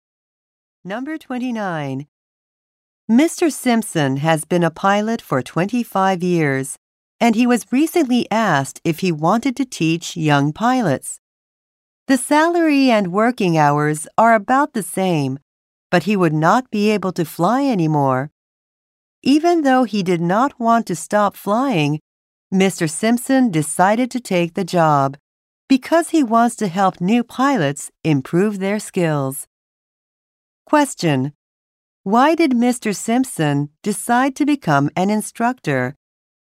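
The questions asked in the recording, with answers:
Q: Why did Mr. Simpson decide to become an instructor?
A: He wants to help new pilots improve their skills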